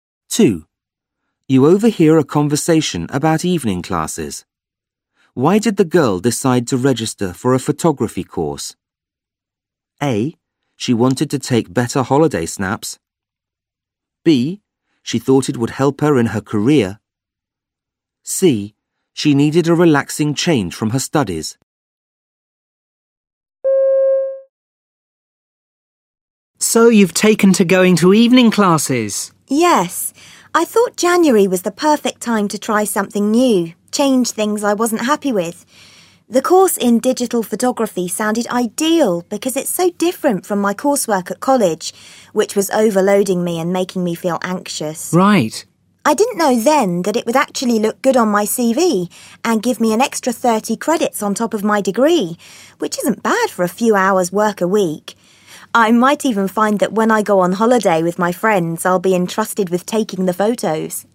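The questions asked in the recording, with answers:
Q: Why did the girl decide to register for a photography course?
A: C: She needed a relaxing change from her studies.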